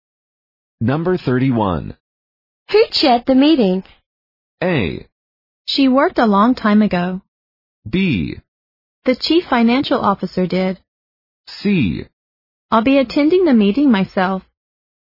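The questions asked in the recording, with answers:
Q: Who chaired the meeting?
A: B: The chief financial officer did.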